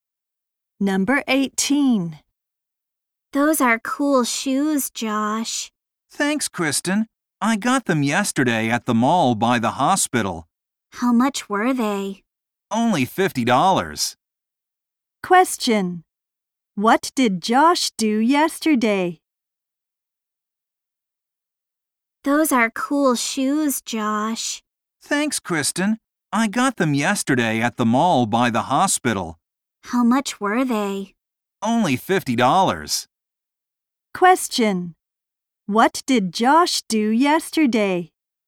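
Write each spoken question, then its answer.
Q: What did Josh do yesterday?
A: He bought shoes at the mall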